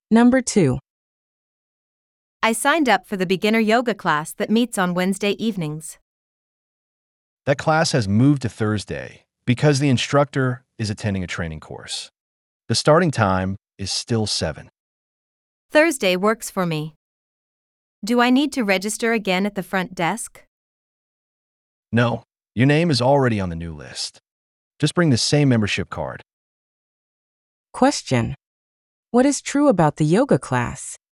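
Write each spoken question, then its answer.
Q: what is true about the yoga class?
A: It has moved from Wednesday to Thursday, still starting at 7.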